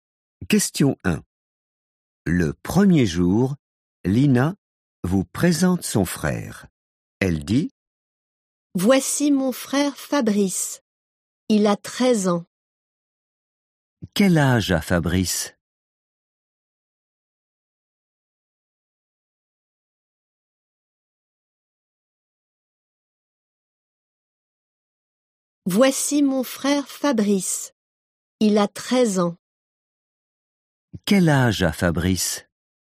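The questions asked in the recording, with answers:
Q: Quel âge a Fabrice?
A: 13 ans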